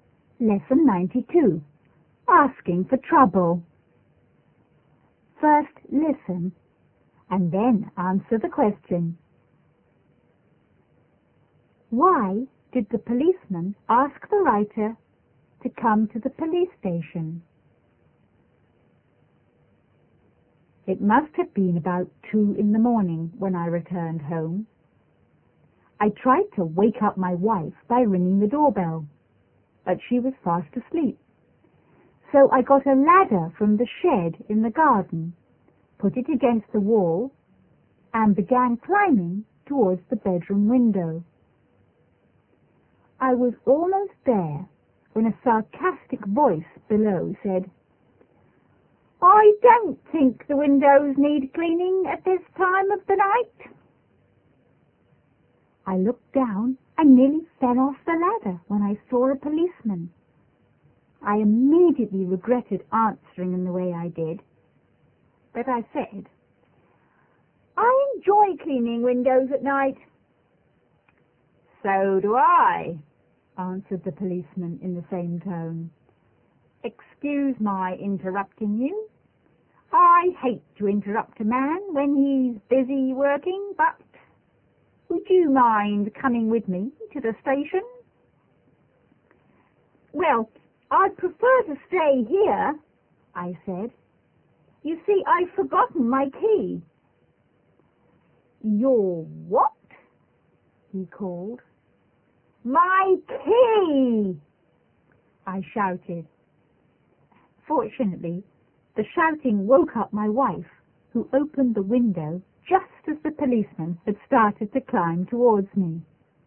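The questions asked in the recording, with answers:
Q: Why did the policeman ask the writer to come to the police station?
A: Because he saw him climbing a ladder to a window at 2 a.m. and thought he was a burglar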